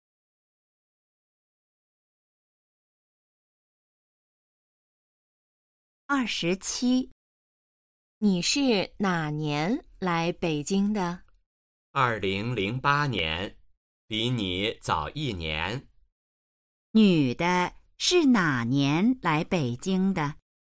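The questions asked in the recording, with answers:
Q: 女的是哪年来北京的?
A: 2008年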